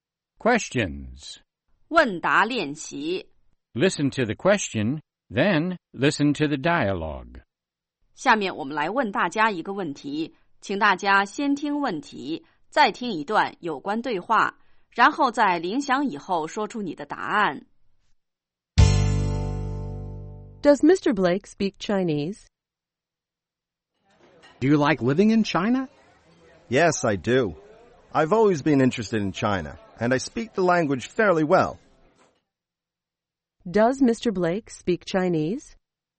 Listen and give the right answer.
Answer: Yes, he does. He speaks the language fairly well.